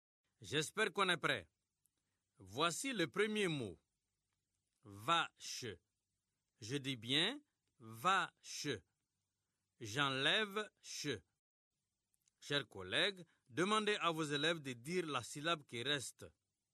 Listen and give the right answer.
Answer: Il reste va.